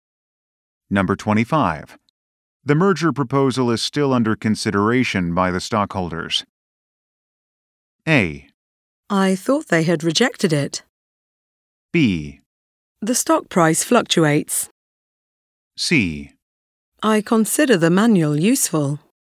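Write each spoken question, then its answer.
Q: The merger proposal is still under consideration by the stockholders.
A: A: I thought they had rejected it.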